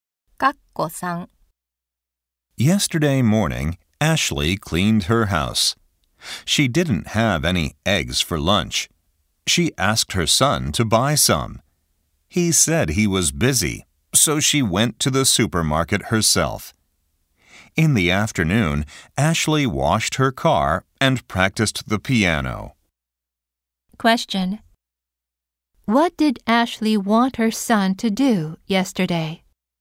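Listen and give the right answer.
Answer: Buy some eggs.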